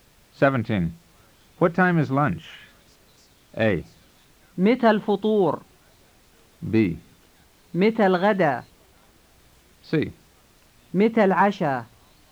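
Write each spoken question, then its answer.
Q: What time is lunch?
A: B: متى الغداء؟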